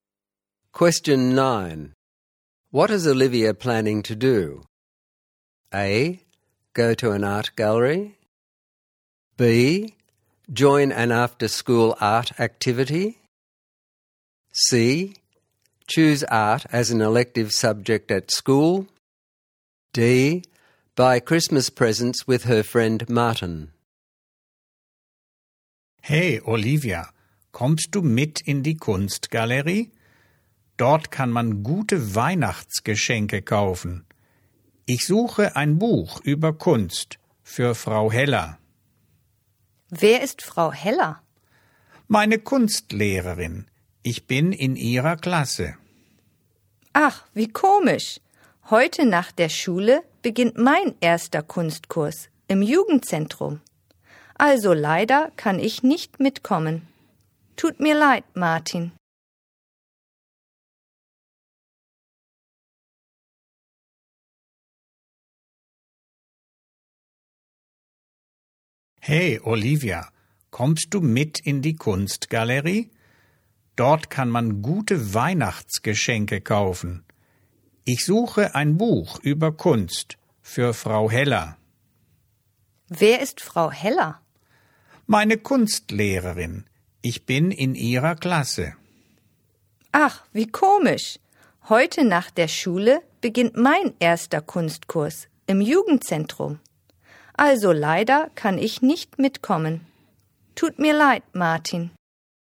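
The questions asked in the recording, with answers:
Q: What is Olivia planning to do?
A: B: Join an after-school art activity.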